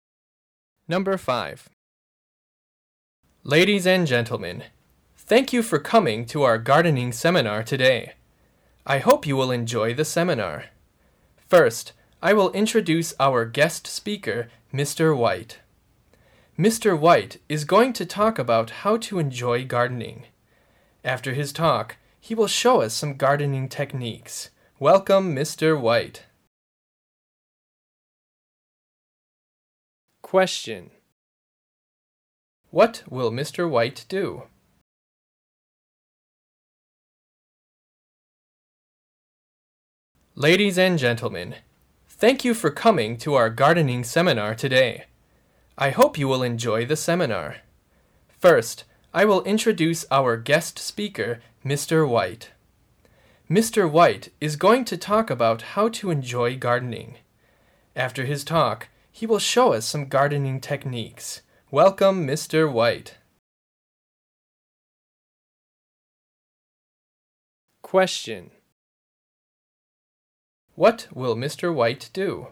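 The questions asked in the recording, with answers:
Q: What will Mr. White do?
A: Talk about how to enjoy gardening and show some gardening techniques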